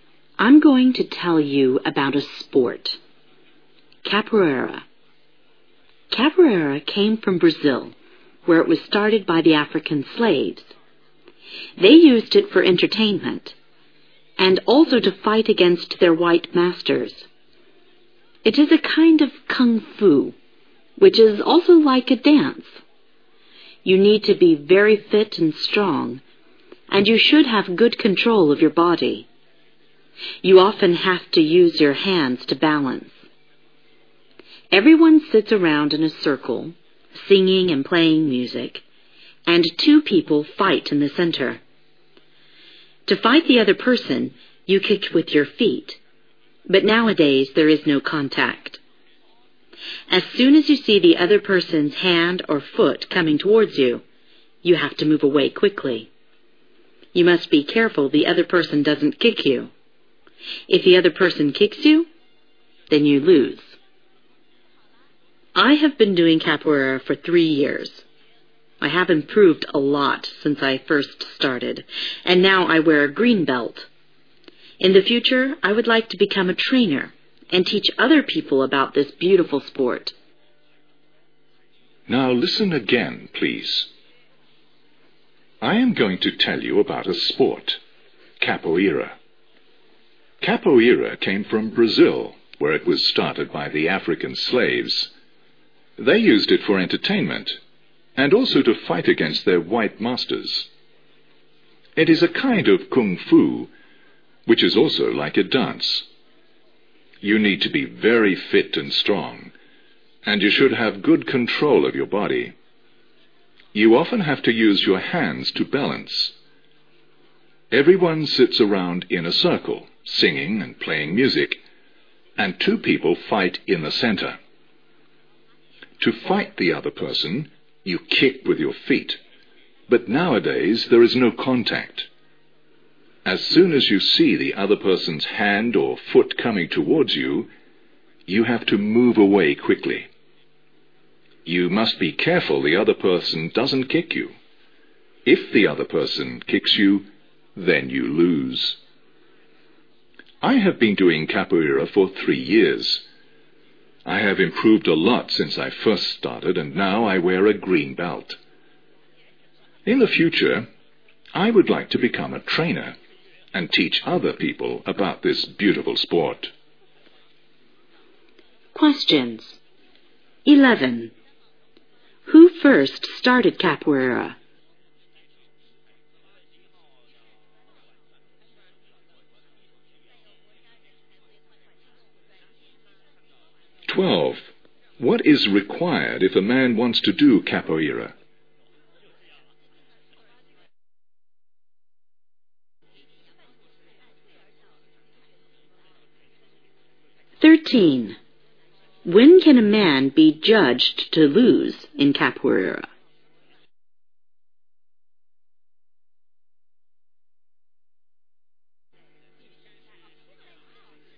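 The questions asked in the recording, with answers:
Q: Who first started capoeira?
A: African slaves in Brazil

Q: What is required if a man wants to do capoeira?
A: Being very fit and strong, with good control of the body

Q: When can a man be judged to lose in capoeira?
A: When the other person kicks him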